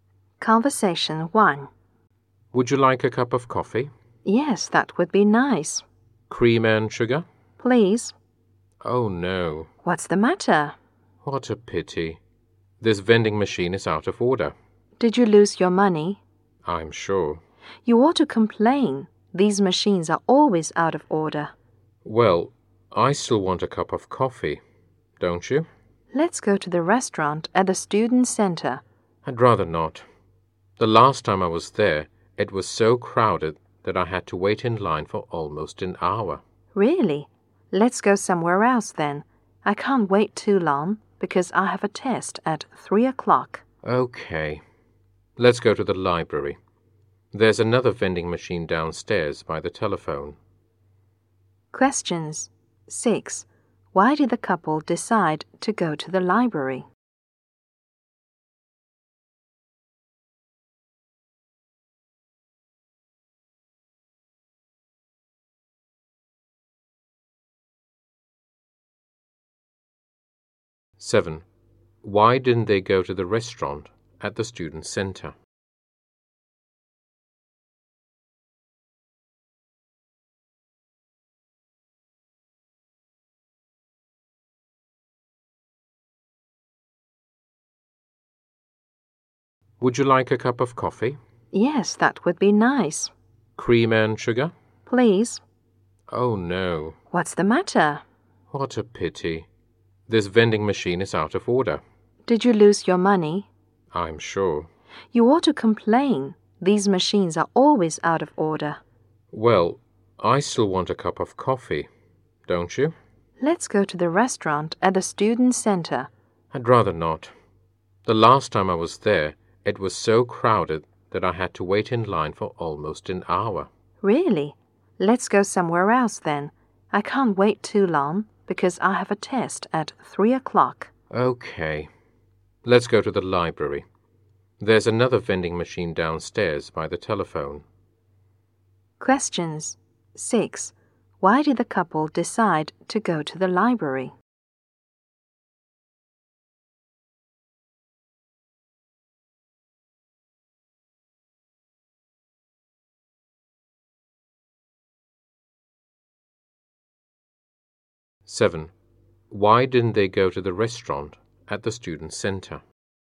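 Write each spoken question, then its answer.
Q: Why did the couple decide to go to the library?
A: There's another vending machine there

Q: Why didn't they go to the restaurant at the student center?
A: It is too crowded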